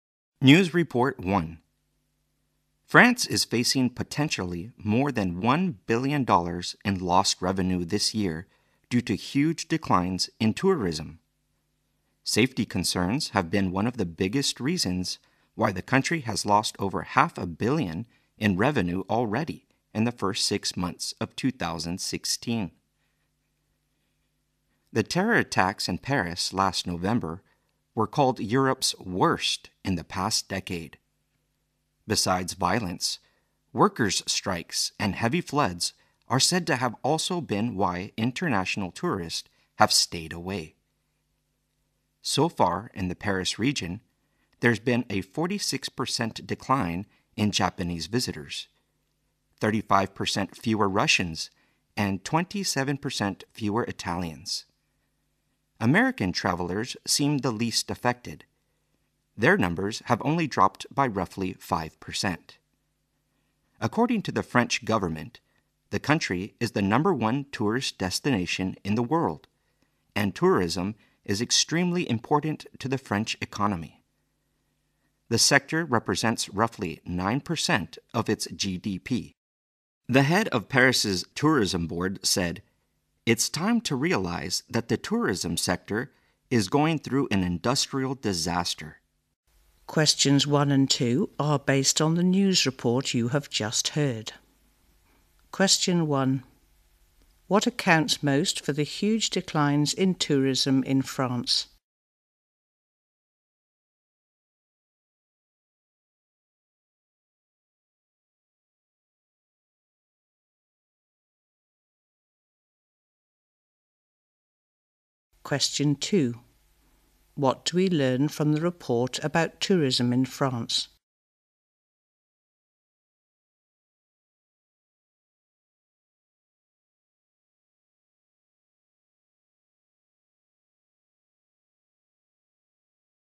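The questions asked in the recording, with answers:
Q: What accounts most for the huge declines in tourism in France?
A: Safety concerns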